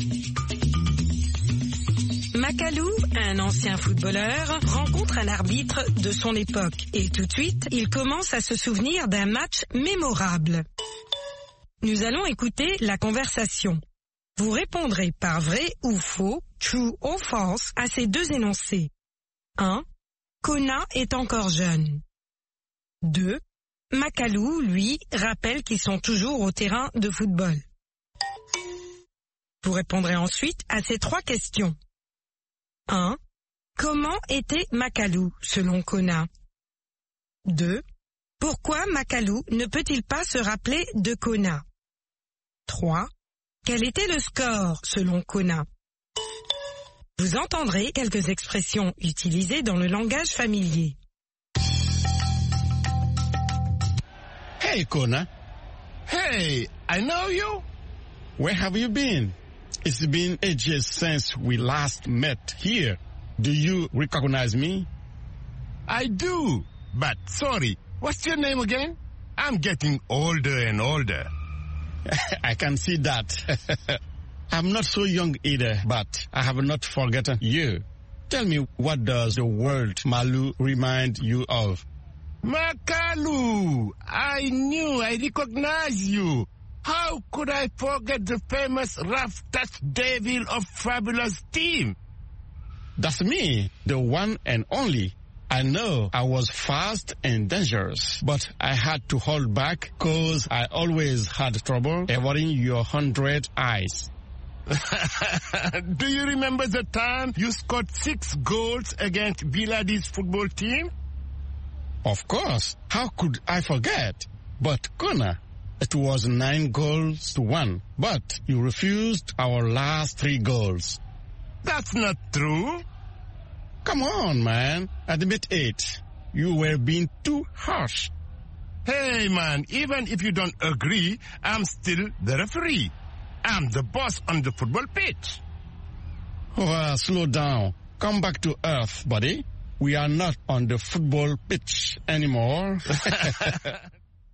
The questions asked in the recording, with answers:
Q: Kona est encore jeune.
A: L'énoncé 1 est faux.

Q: Makalou, lui, rappelle qu'ils sont toujours au terrain de football.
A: L'énoncé 2 est faux.

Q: Pourquoi Makalou ne peut-il pas se rappeler de Kona?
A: Parce qu'il devient de plus en plus vieux.